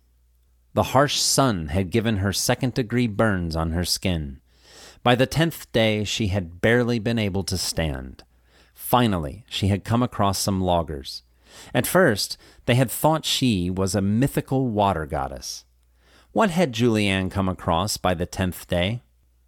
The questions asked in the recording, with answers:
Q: What had Julianne come across by the 10th day?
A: She had come across some loggers by the 10th day.